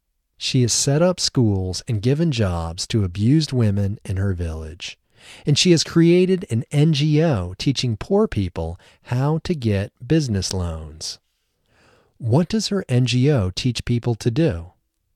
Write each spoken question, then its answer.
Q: What does her NGO teach people to do?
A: Her NGO teaches poor people how to get business loans.